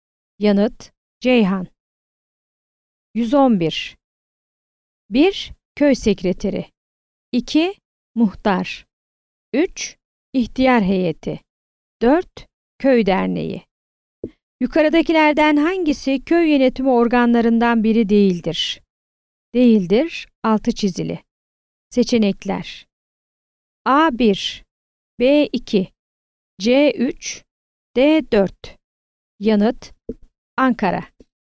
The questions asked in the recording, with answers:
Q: Yukarıdakilerden hangisi köy yönetimi organlarından biri değildir?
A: Yanıt: Ankara.